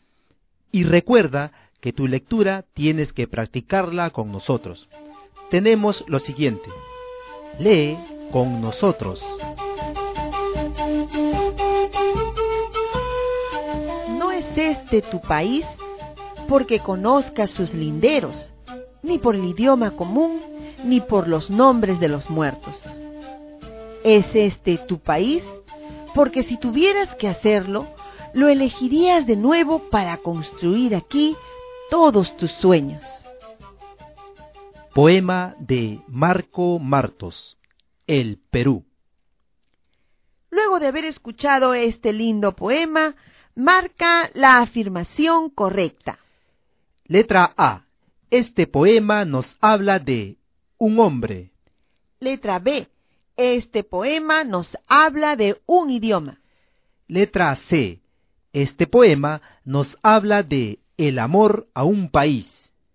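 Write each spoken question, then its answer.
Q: Luego de haber escuchado este lindo poema, marca la afirmación correcta.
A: C: Este poema nos habla de el amor a un país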